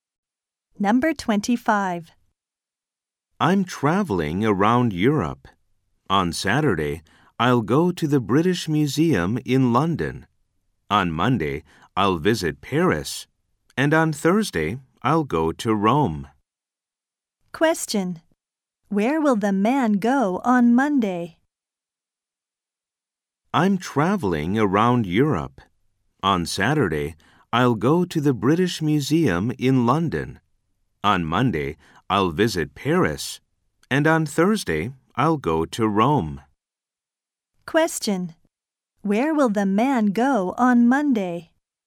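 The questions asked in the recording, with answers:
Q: Where will the man go on Monday?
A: Paris.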